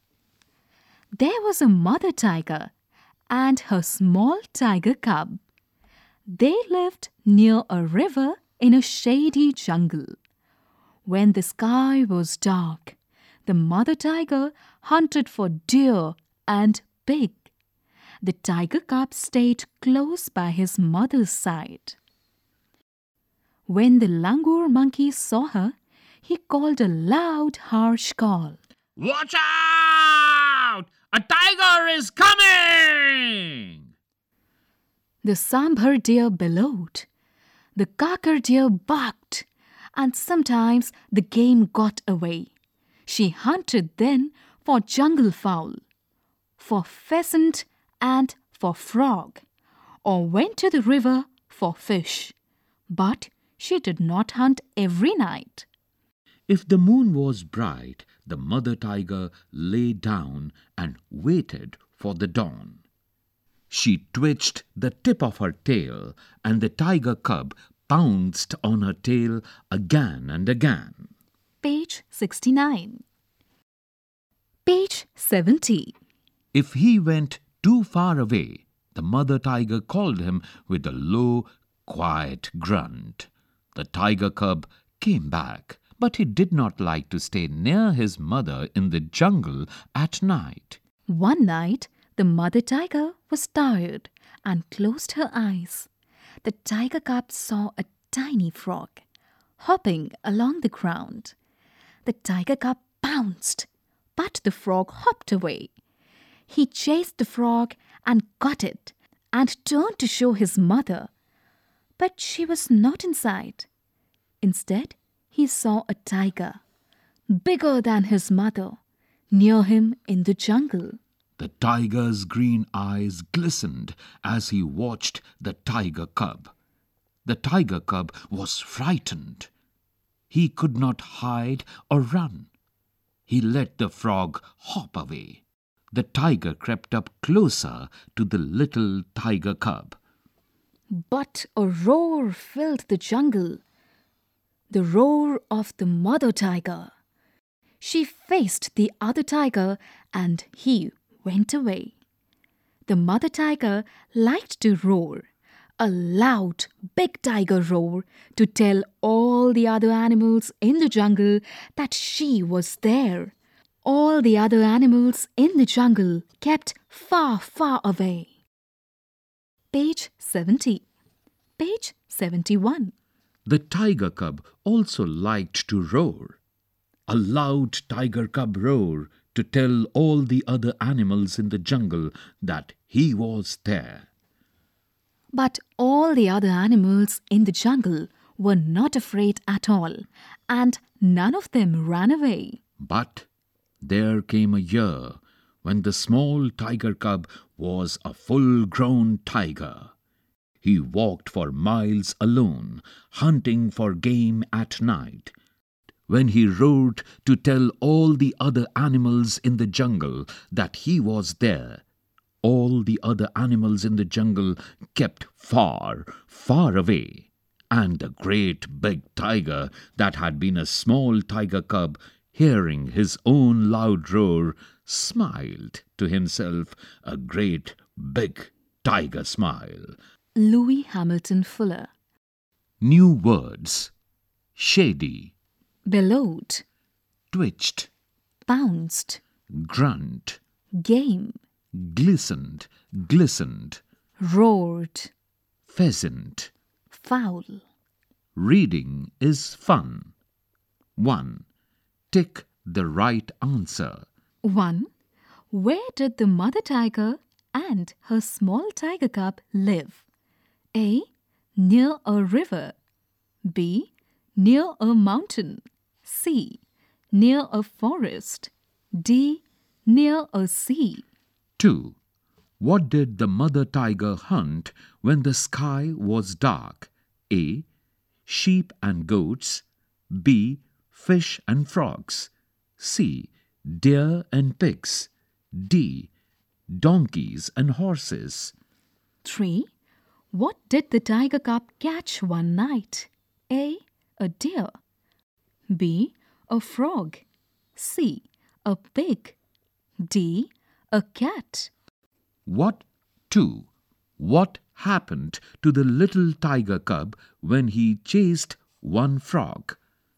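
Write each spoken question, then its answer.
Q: Where did the mother tiger and her small tiger cub live?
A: A: Near a river.

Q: What did the mother tiger hunt when the sky was dark?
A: C: Deer and pigs.

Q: What did the tiger cub catch one night?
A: B: A frog.

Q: What happened to the little tiger cub when he chased one frog?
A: He lost sight of his mother, and a bigger tiger crept up on him until his mother roared and chased it away.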